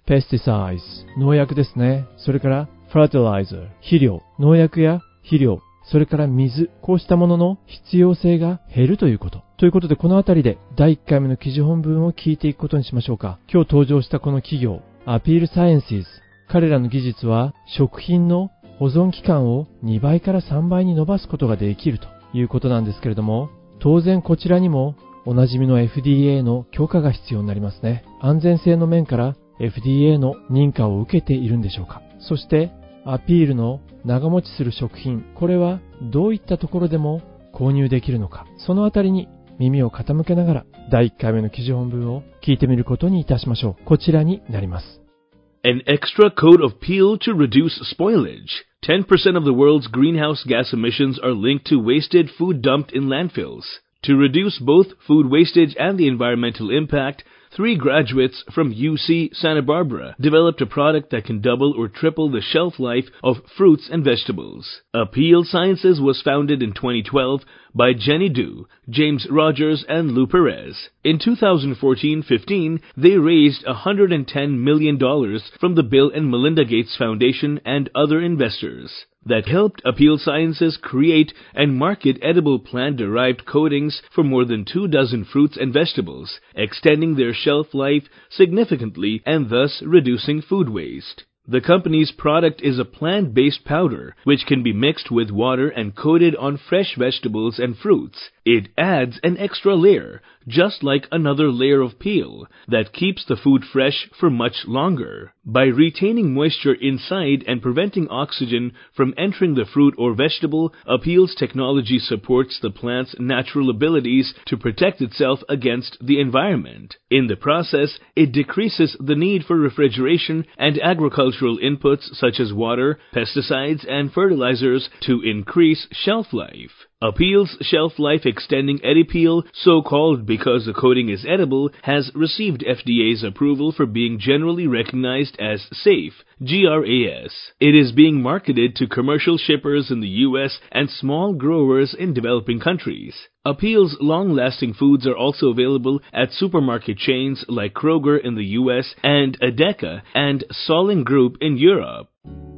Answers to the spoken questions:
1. まあどうやら取ってるようですね。 Received FDA's approval と言っていましたからね。
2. アメリカのスーパーマーケットチェーンのクロガーや、ヨーロッパのエデカ、それからセーリンググループ、こうしたスーパーマーケットチェーンでも購入することができるそうです。